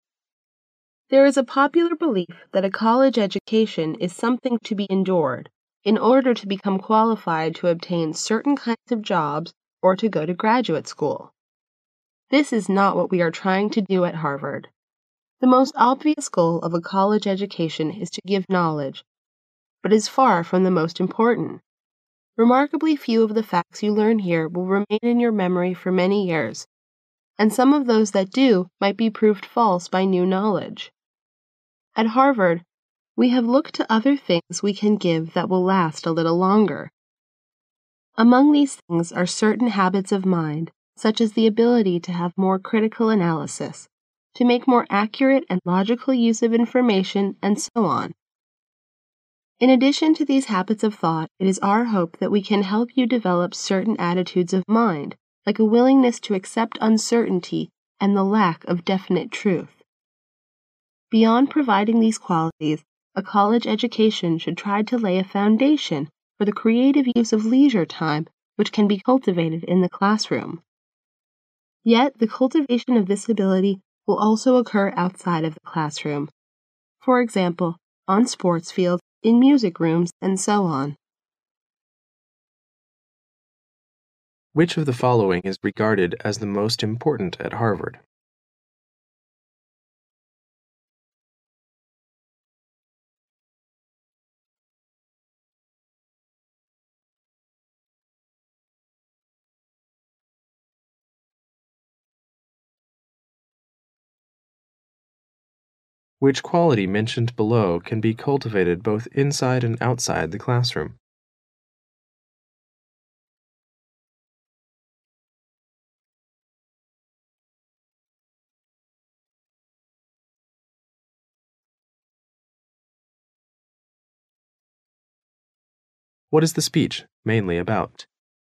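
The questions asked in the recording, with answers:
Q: Which quality mentioned below can be cultivated both inside and outside the classroom?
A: The creative use of leisure time

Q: What is the speech mainly about?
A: The goals of a college education at Harvard

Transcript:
A B C D C [听力原文] There is a popular belief that a college education is something to be endured in order to become qualified to obtain certain kinds of jobs or to go to graduate school. This is not what we are trying to do a Harvard. The most obvious goal of a college education is to give knowledge, but it is far from the most important. Remarkably few of the facts you learn here will remain in your memory for many years, and some of those that do might be proved false by new knowledge. At Harvard, we have looked to other things we can give that will last a little longer. Among these things are certain habits of mind, such as the ability to have more critical analysis, to make more accurate and logical use of information and so on. 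In addition to these habits of thought, it is our hope that we can help you develop certain attitudes of mind like a willingness to accept uncertainty and the lack of definite truth. Beyond providing these qualities, a college education should try to lay a foundation for the creative use of leisure time which can be cultivated in the classroom. Yet, the cultivation of this ability will also occur outside of the classroom. For example, on sports fields, in music rooms, and so on. Which of the following is regarded as the most important at Harvard? A.The ability to have critical analysis. A B C D B [听力原文] Which quality mentioned below can be cultivated both inside and outside the classroom?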